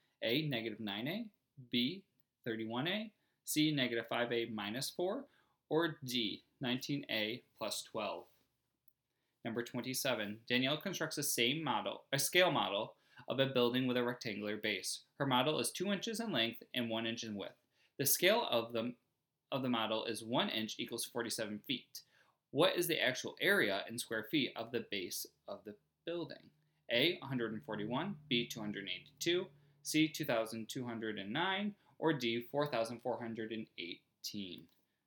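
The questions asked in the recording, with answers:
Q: What is the actual area in square feet of the base of the building?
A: D: 4,418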